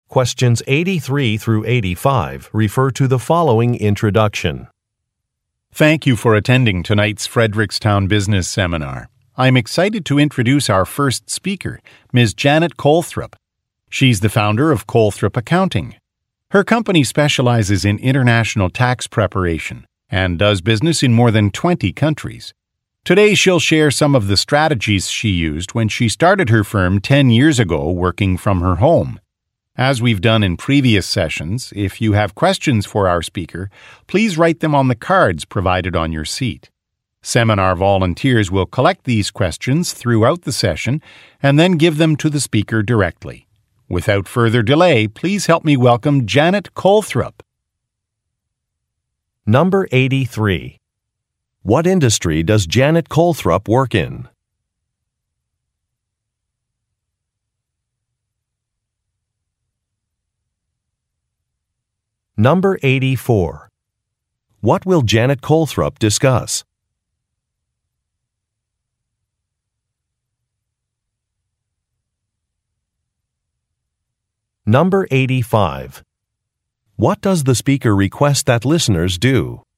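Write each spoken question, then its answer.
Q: What industry does Janet Colthrop work in?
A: Accounting

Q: What will Janet Colthrop discuss?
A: Strategies she used when starting her firm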